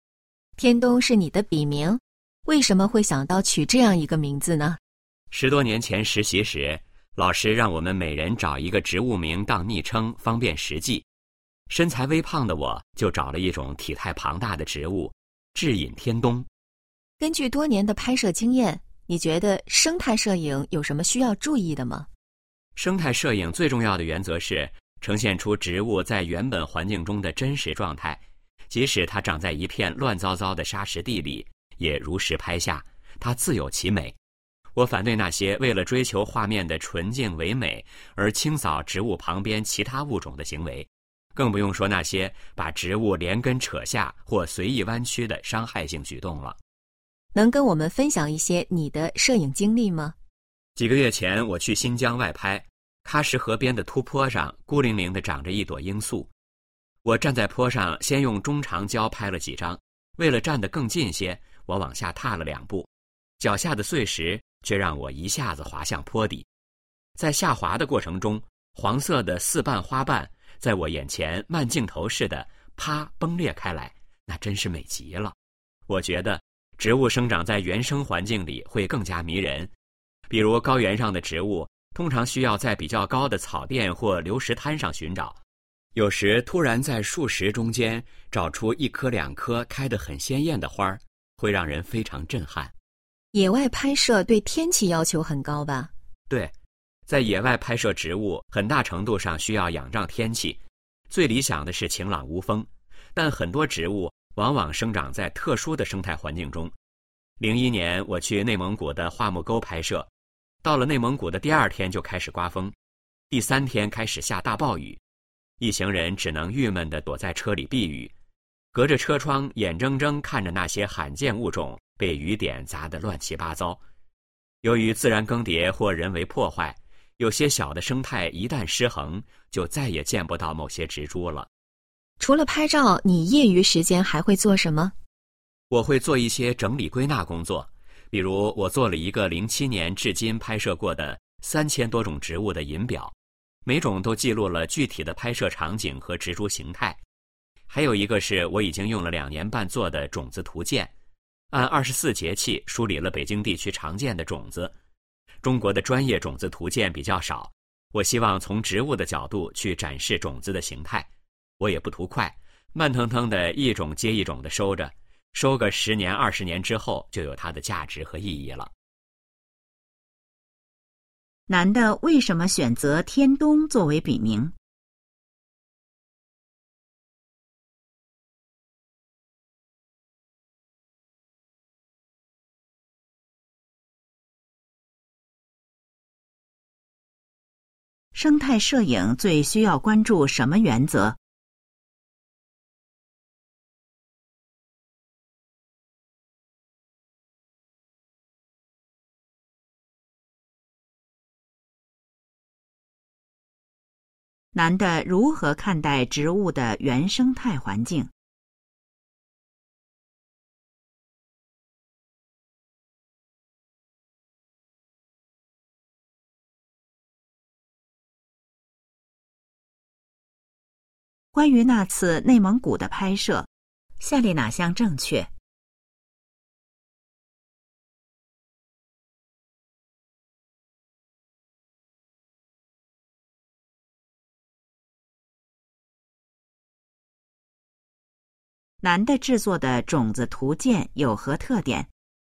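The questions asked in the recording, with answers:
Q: 男的为什么选择天东作为笔名?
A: 因为他身材微胖,选了一种体态庞大的植物

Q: 生态摄影最需要关注什么原则?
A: 呈现植物在原本环境中的真实状态

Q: 男的如何看待植物的原生态环境?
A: 植物生长在原生环境里会更加迷人

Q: 男的制作的种子图鉴有何特点?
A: 按24节气梳理北京地区常见的种子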